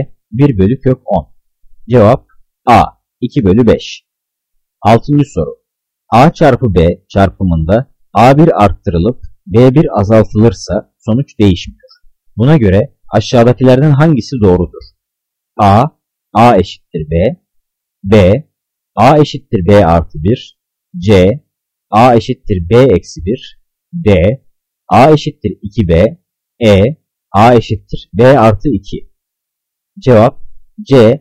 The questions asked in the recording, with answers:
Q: Buna göre aşağıdakilerden hangisi doğrudur?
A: Cevap C. A eşittir B eksi 1.